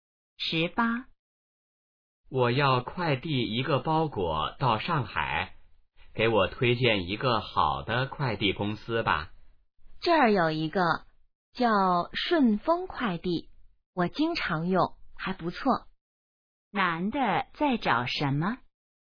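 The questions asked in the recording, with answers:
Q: 男的在找什么?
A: 好的快递公司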